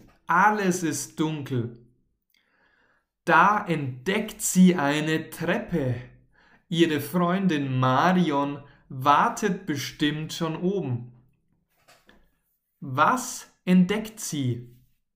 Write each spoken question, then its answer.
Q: Was entdeckt sie?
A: Eine Treppe. Sie entdeckt eine Treppe.